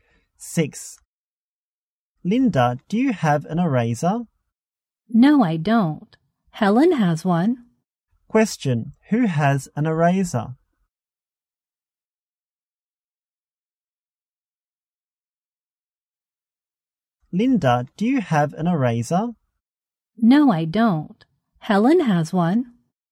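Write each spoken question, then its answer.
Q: Question, who has an eraser?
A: Helen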